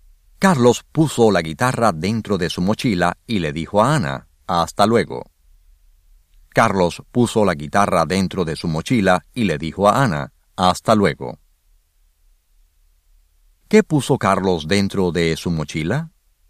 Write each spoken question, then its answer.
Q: ¿Qué puso Carlos dentro de su mochila?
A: Carlos puso la guitarra adentro de su mochila.